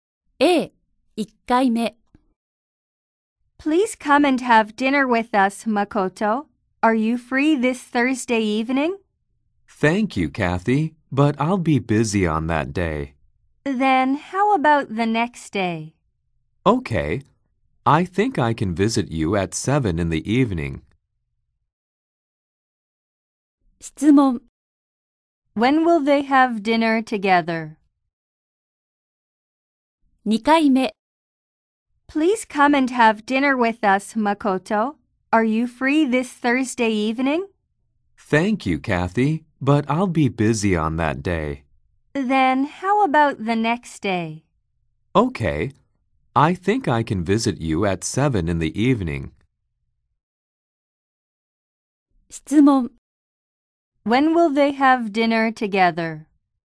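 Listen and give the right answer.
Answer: Friday at 7 in the evening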